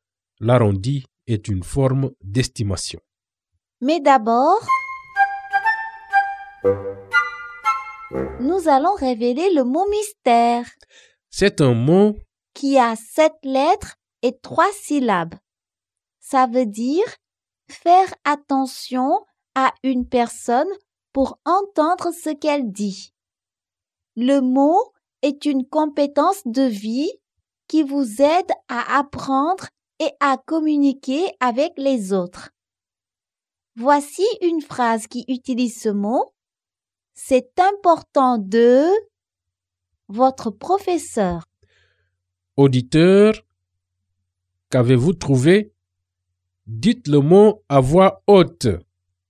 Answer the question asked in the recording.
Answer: Le mot mystère est écouter.